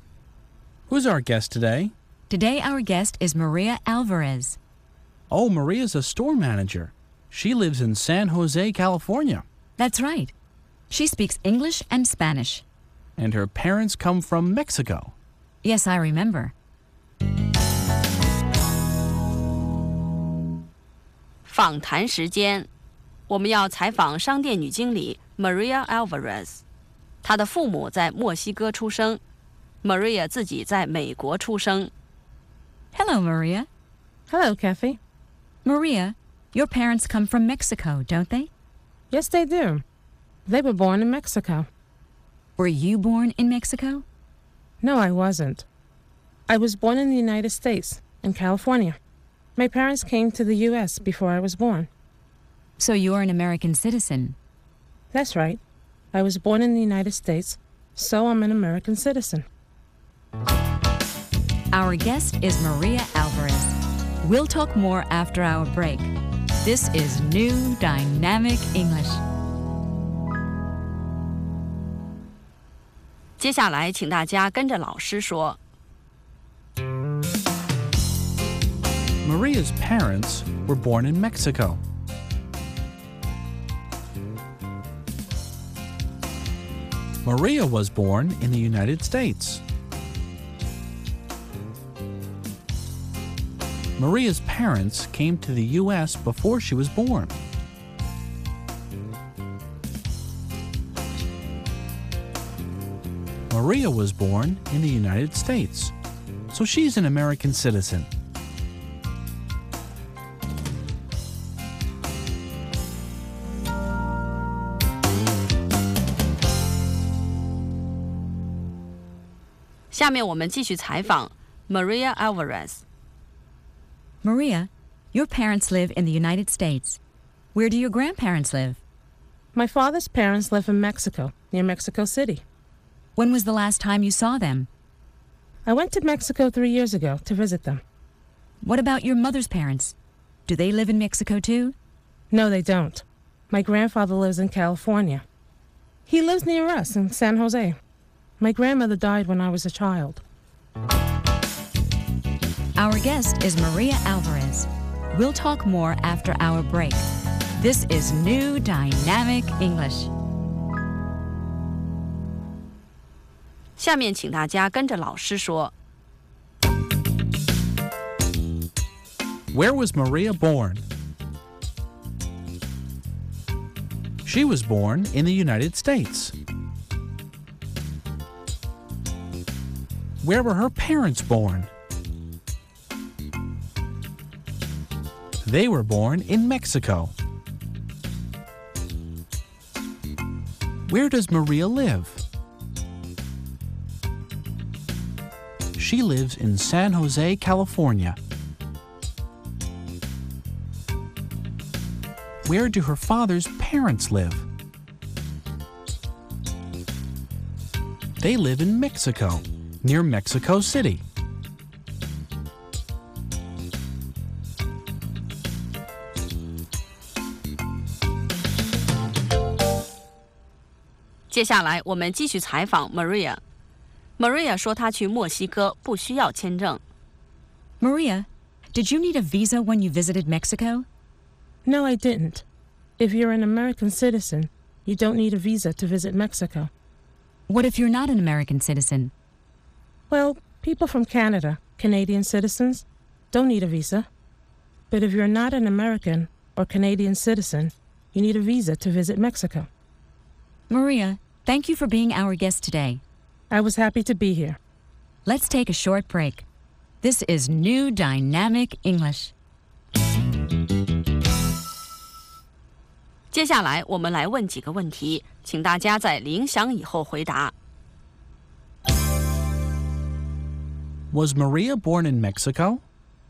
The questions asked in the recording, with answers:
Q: Was Maria born in Mexico?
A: No, she wasn't. She was born in the United States.